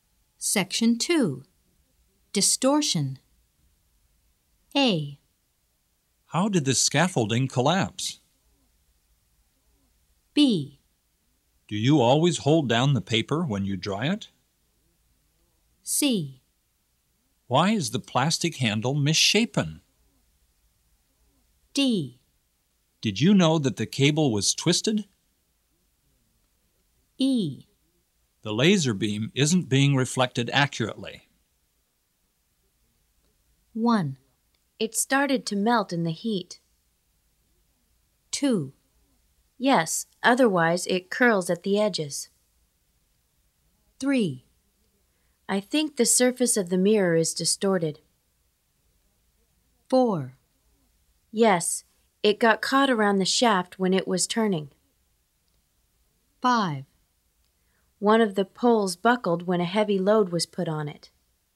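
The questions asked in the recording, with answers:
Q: It started to melt in the heat.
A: C: Why is the plastic handle misshapen?

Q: Yes, otherwise it curls at the edges.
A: B: Do you always hold down the paper when you dry it?

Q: I think the surface of the mirror is distorted.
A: E: The laser beam isn't being reflected accurately.

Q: Yes, it got caught around the shaft when it was turning.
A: D: Did you know that the cable was twisted?

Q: One of the poles buckled when a heavy load was put on it.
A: A: How did the scaffolding collapse?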